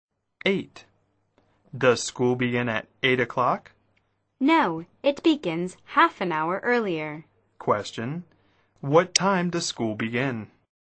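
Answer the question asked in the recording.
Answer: 7:30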